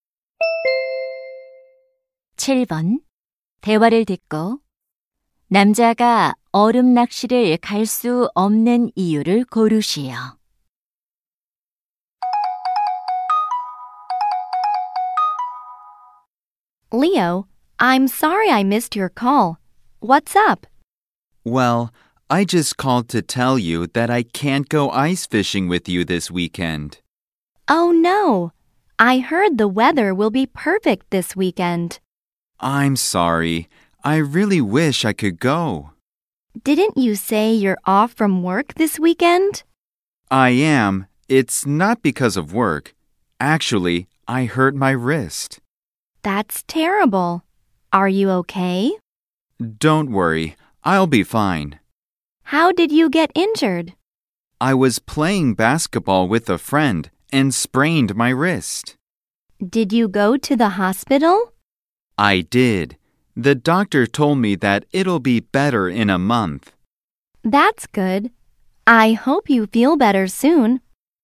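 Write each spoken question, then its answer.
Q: 대화를 듣고 남자가 얼음 낚시를 갈 수 없는 이유를 고르시오.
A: 손목을 다쳐서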